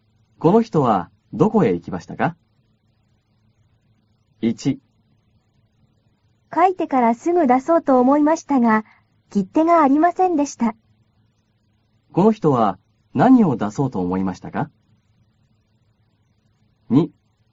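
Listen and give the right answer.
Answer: 手紙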